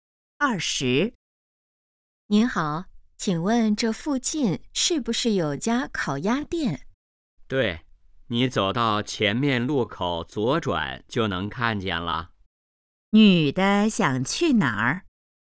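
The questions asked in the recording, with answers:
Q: 女的想去哪儿?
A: 烤鸭店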